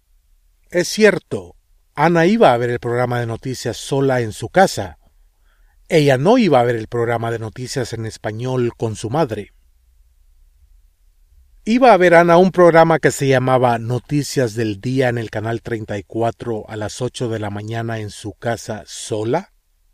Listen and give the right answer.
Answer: Sí.